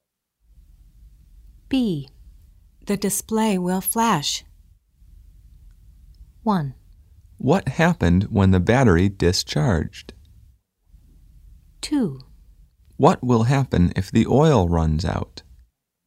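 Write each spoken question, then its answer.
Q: The display will flash.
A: 2: What will happen if the oil runs out?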